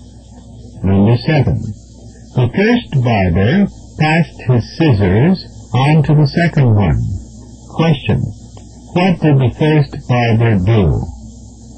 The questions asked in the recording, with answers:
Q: What did the first barber do?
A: He gave the second one his scissors.